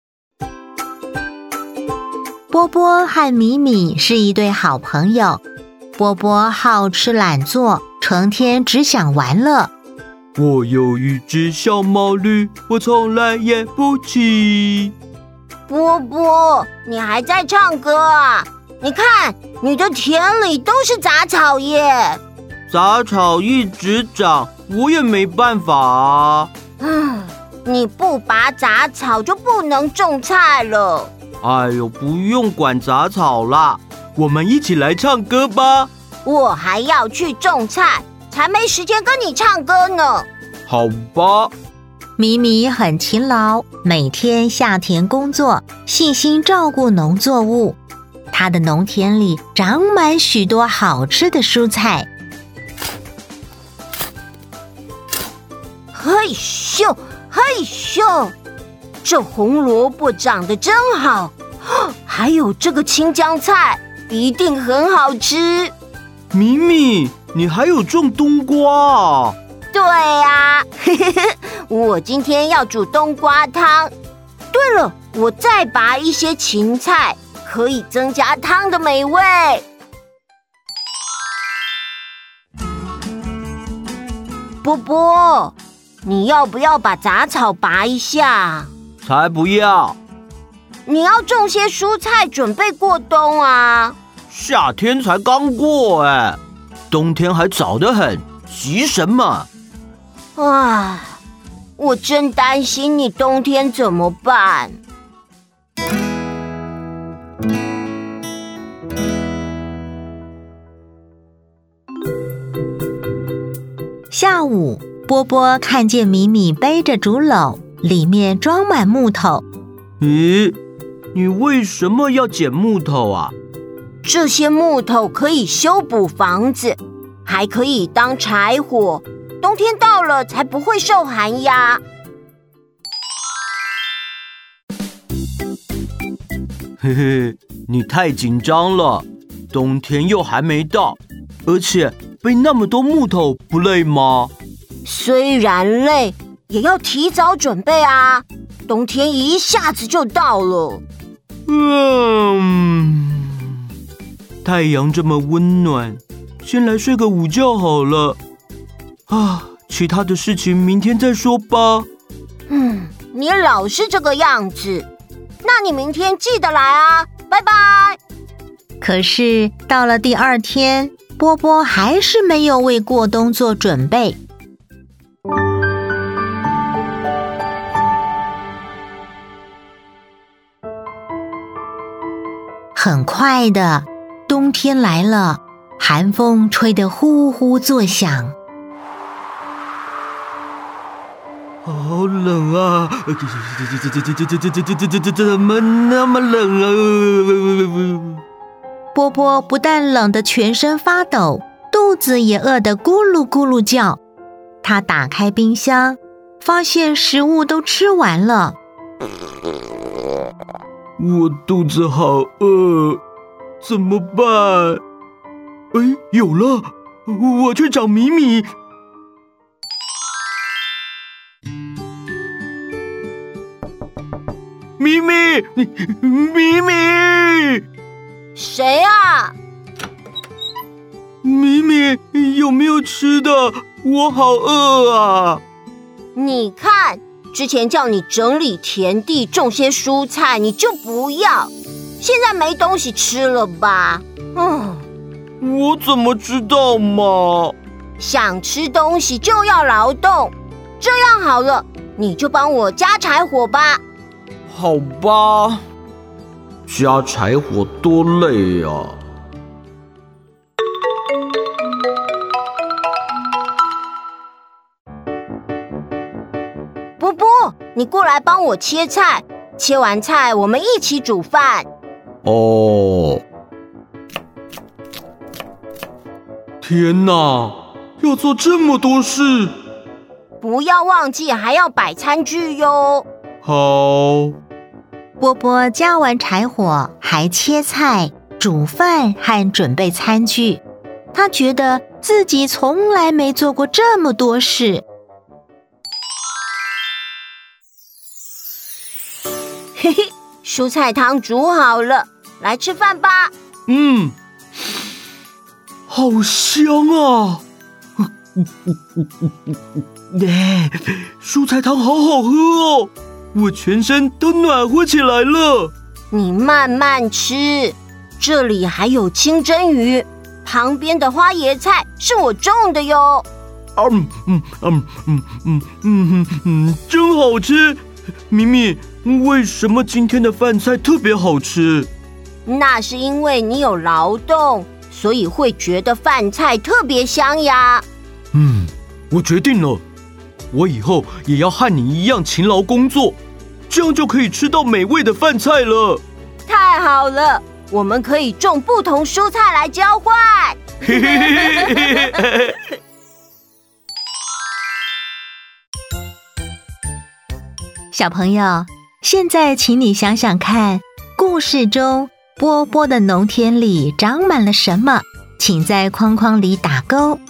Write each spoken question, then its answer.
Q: 小朋友,现在请你想想看,故事中波波的农田里长满了什么?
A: 杂草。